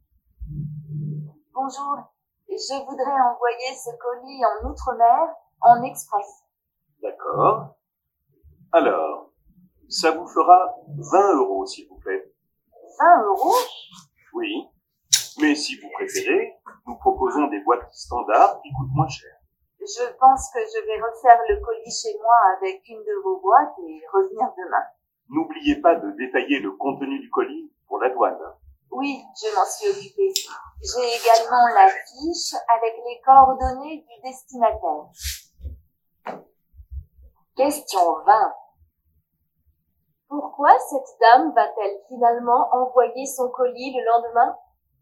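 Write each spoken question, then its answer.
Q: Pourquoi cette dame va-t-elle finalement envoyer son colis le lendemain ?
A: Parce qu'elle va refaire le colis chez elle avec une boîte standard, moins chère.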